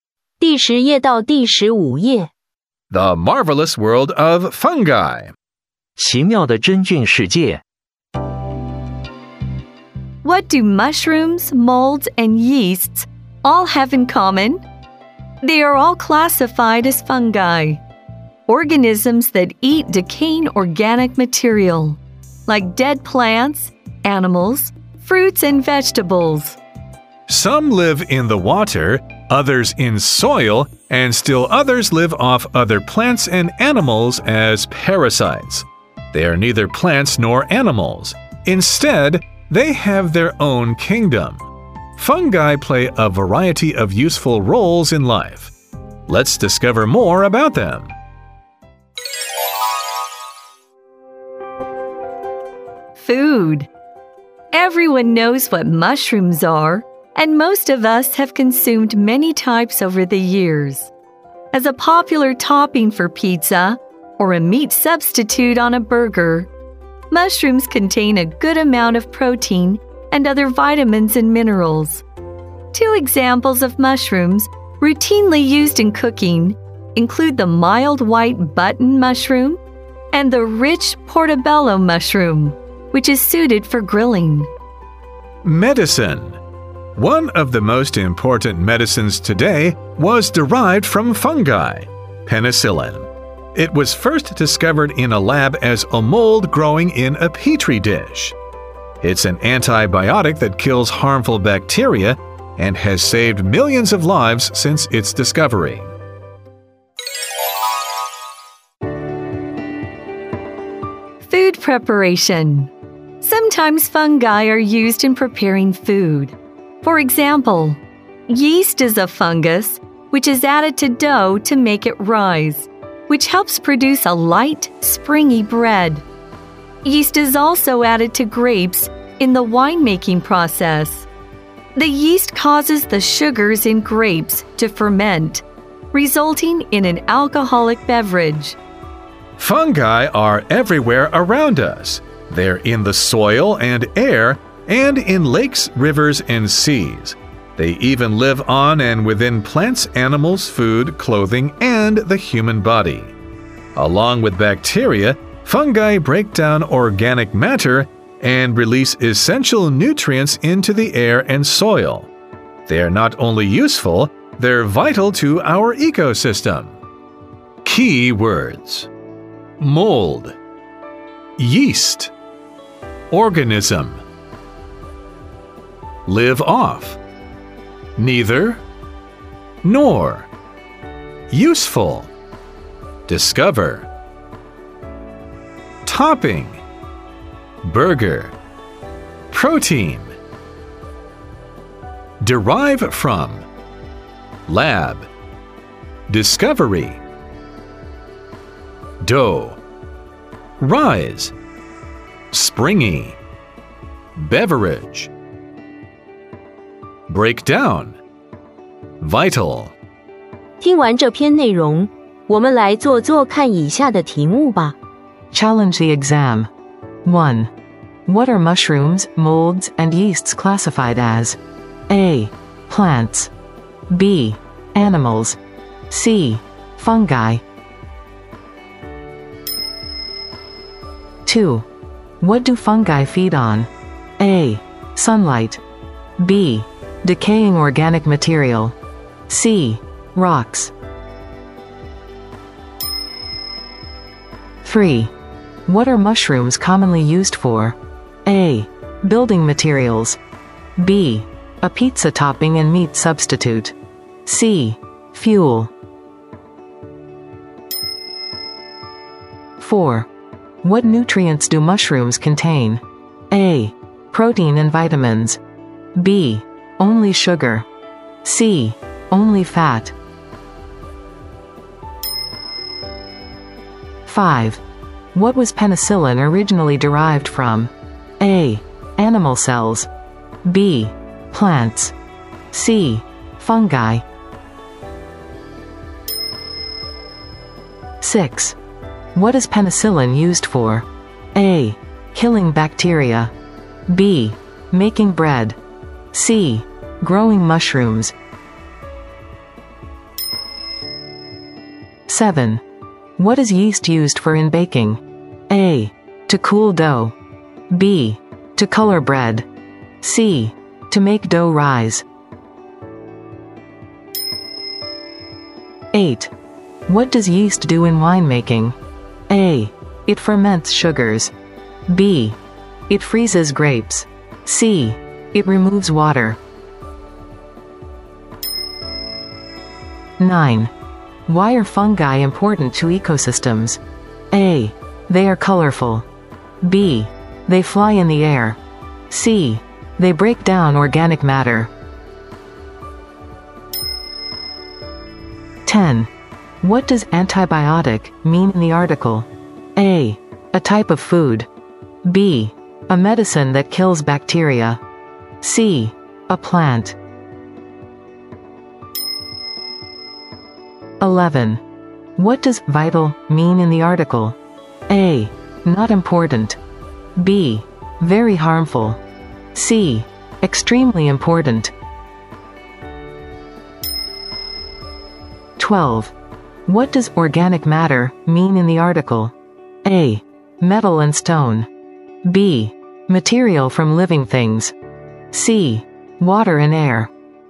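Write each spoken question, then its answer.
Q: What are mushrooms, molds, and yeasts classified as?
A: C: Fungi

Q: What do fungi feed on?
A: B: Decaying organic material

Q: What are mushrooms commonly used for?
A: B: A pizza topping and meat substitute

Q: What nutrients do mushrooms contain?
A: A: Protein and vitamins

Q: What was penicillin originally derived from?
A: C: Fungi

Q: What is penicillin used for?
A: A: Killing bacteria

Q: What is yeast used for in baking?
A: C: To make dough rise

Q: What does yeast do in winemaking?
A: A: It ferments sugars

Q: Why are fungi important to ecosystems?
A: C: They break down organic matter

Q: What does antibiotic mean in the article?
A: B: A medicine that kills bacteria

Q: What does vital mean in the article?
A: C: Extremely important

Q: What does organic matter mean in the article?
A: B: Material from living things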